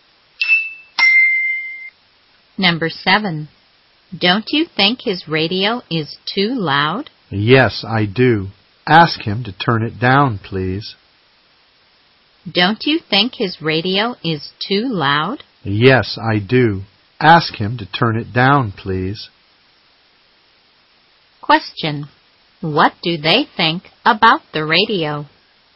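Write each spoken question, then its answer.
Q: What do they think about the radio?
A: It is too loud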